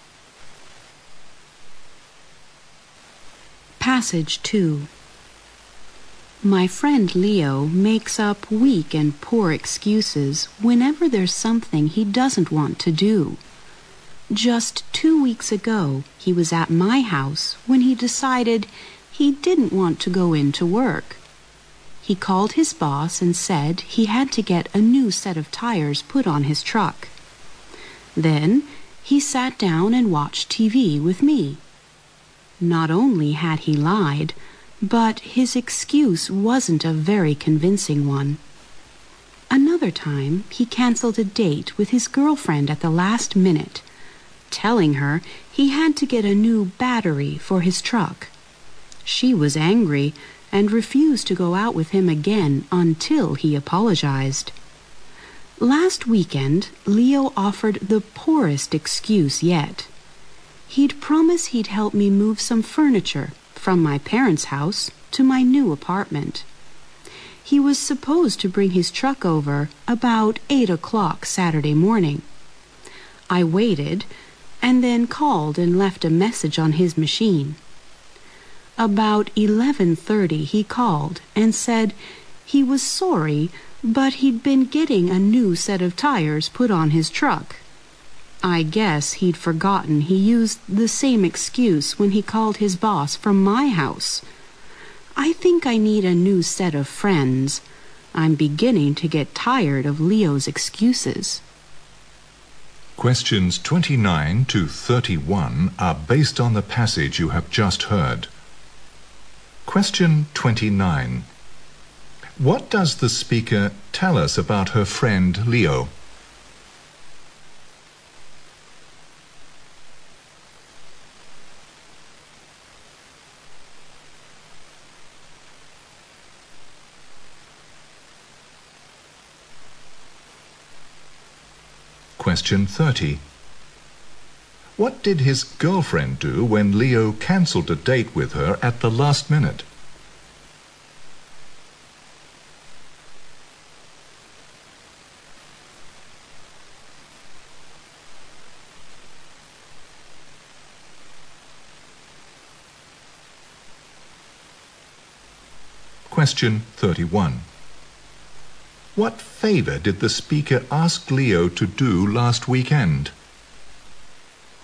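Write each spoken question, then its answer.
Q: What does the speaker tell us about her friend Leo?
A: He often makes up poor excuses.

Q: What did his girlfriend do when Leo cancelled a date with her at the last minute?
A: She refused to go out with him again until he apologized.

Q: What favor did the speaker ask Leo to do last weekend?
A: Help move furniture to her new apartment with his truck.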